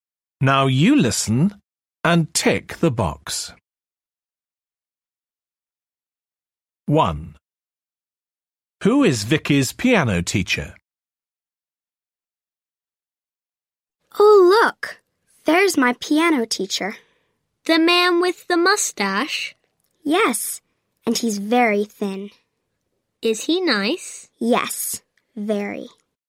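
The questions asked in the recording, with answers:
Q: Who is Vicky's piano teacher?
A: The thin man with the mustache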